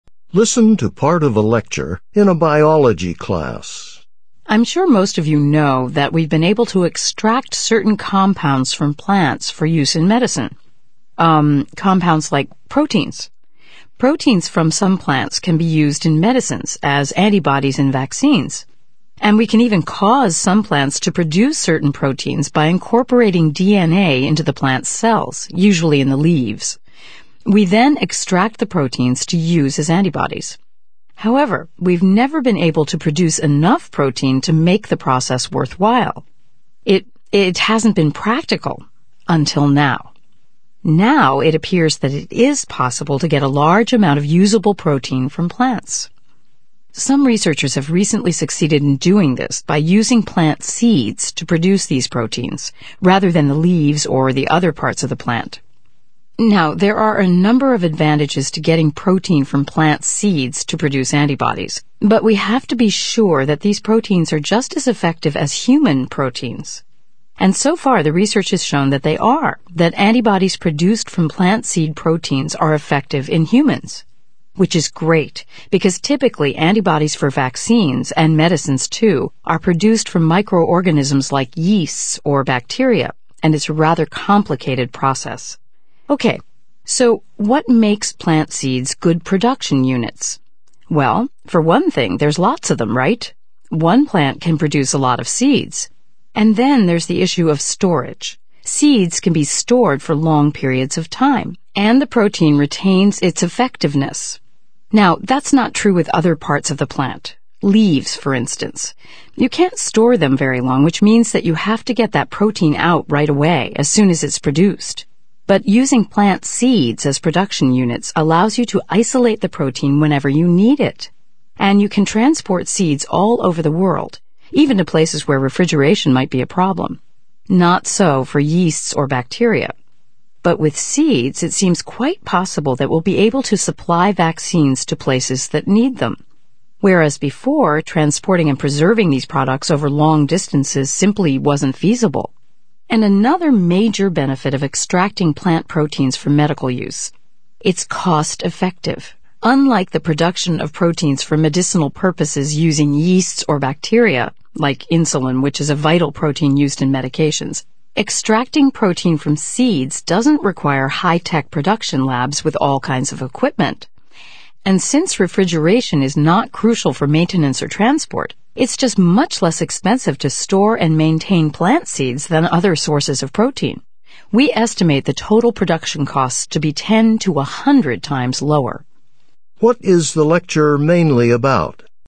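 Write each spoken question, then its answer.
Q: What is the lecture mainly about?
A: The advantages of using plant seeds to produce proteins for medicines such as antibodies and vaccines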